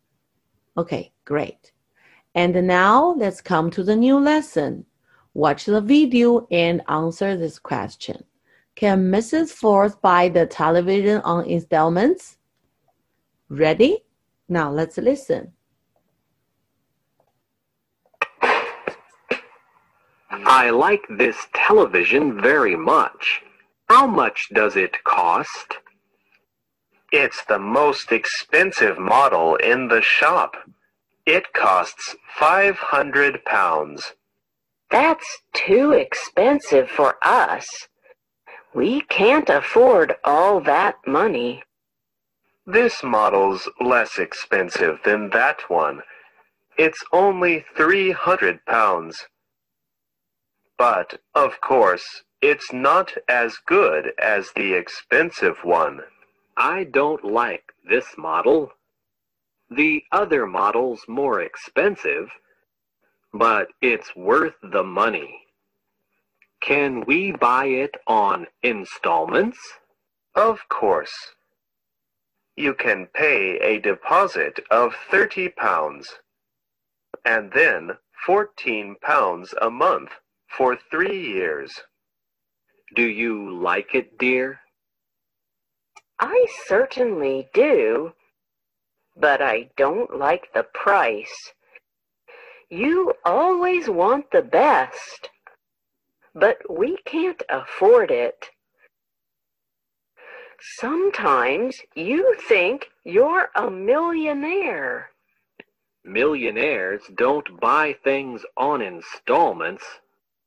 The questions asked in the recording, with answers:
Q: Can Mrs. Ford buy the television on installments?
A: So from the video, we can see the man will buy the television on installment.